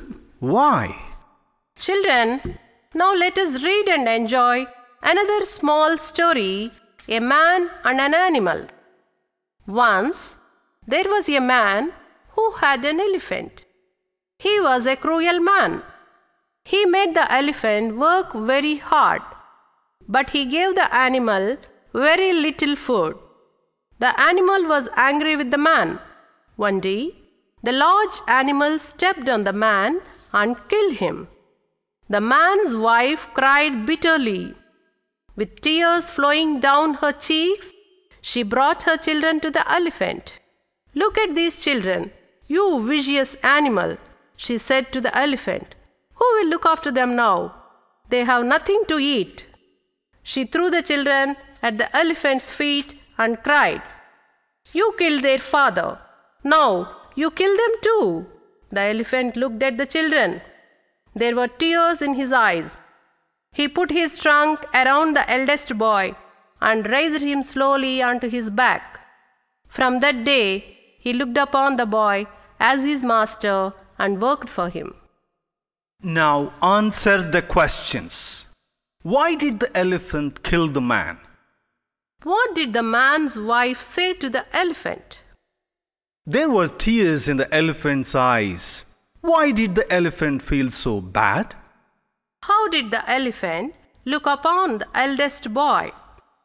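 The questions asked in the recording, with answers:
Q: Why did the elephant kill the man?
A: The man was cruel: he made it work very hard but gave it very little food.

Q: What did the man's wife say to the elephant?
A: Look at these children, you vicious animal. Who will look after them now? You killed their father. Now you kill them too.

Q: How did the elephant look upon the eldest boy?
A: As his master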